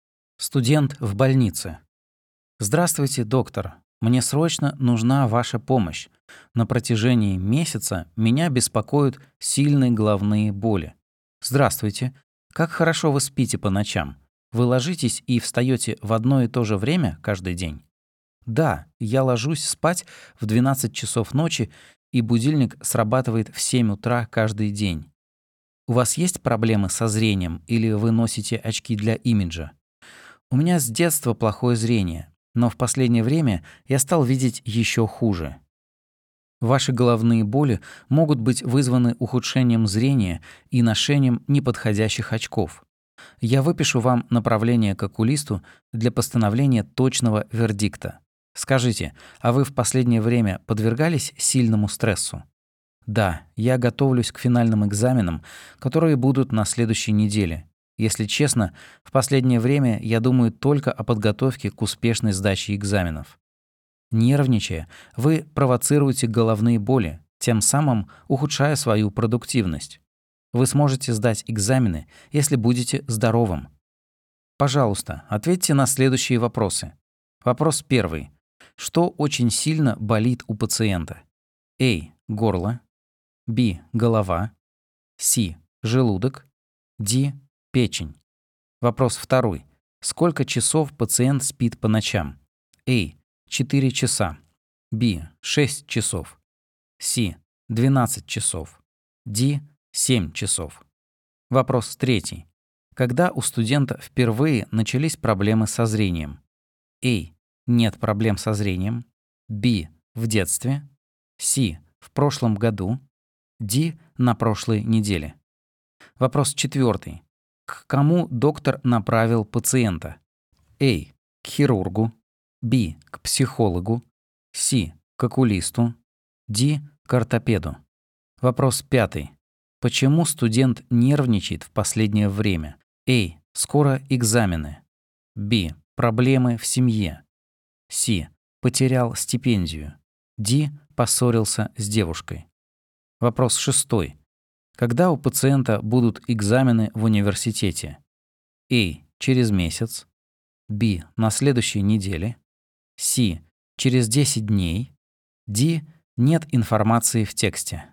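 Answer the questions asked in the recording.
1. Б: Голова
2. Д: 7 часов
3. Б: В детстве
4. С: К окулисту
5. А: Скоро экзамены
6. Б: На следующей неделе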